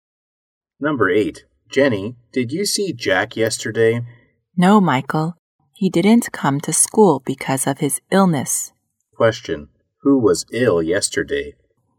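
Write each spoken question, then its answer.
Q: Question, who was ill yesterday?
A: Jack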